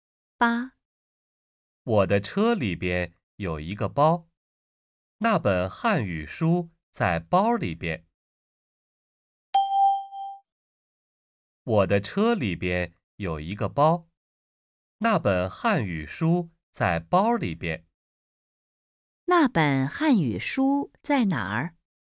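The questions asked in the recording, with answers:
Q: 那本汉语书在哪儿?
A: 在车里边的包里边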